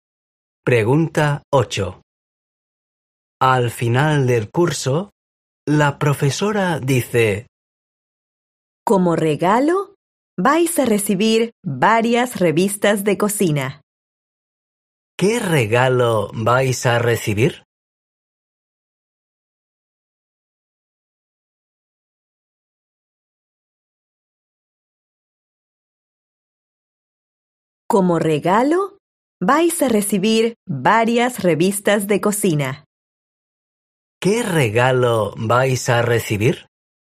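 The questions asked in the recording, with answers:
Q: ¿Qué regalo vais a recibir?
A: Varias revistas de cocina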